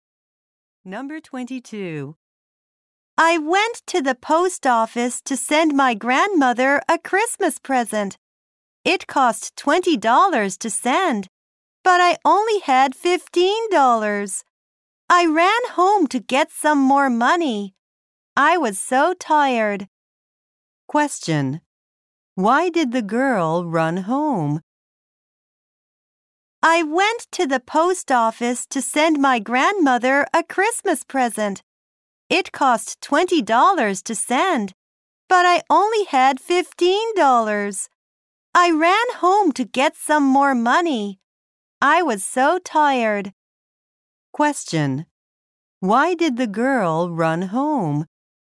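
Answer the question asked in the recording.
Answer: To get more money.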